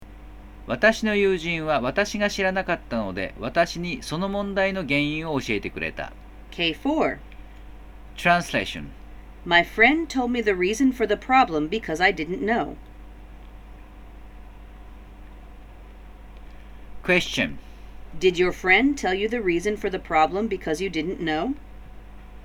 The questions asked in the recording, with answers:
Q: Did your friend tell you the reason for the problem because you didn't know?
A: Yes, he did.